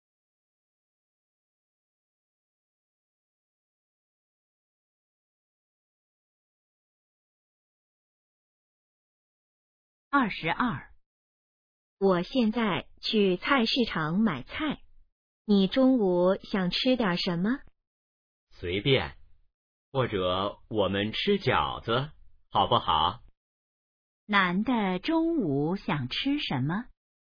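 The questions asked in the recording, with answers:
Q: 男的中午想吃什么?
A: 饺子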